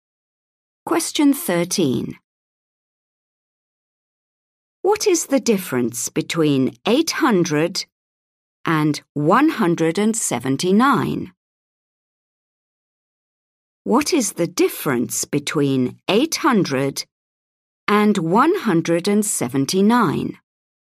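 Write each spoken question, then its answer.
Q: What is the difference between 800 and 179?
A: 621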